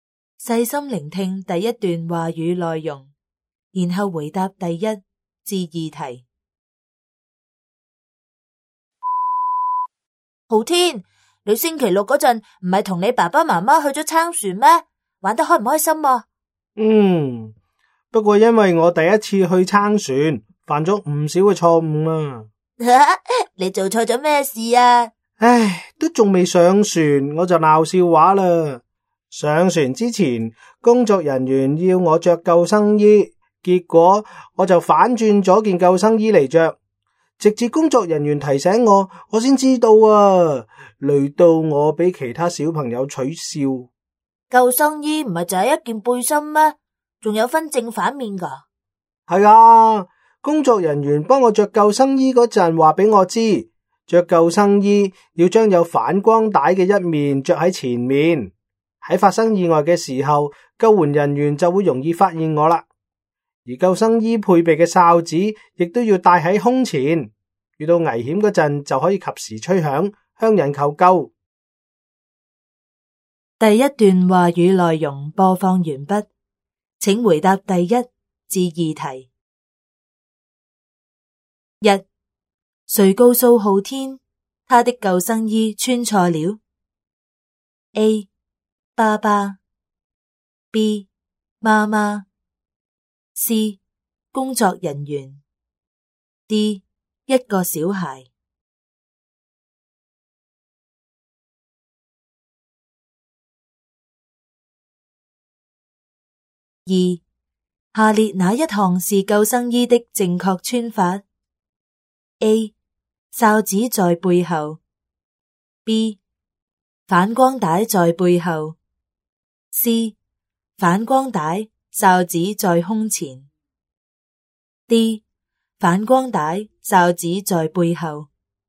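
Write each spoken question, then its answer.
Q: 谁告诉浩天他的救生衣穿错了 ?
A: C: 工作人员

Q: 下列哪一项是救生衣的正确穿法 ?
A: C: 反光带、哨子在胸前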